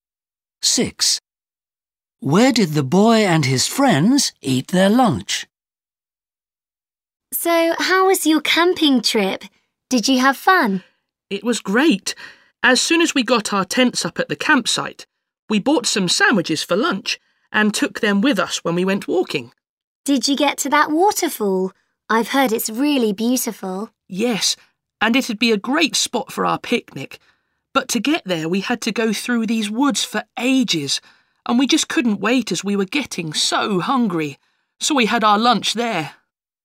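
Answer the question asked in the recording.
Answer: In the woods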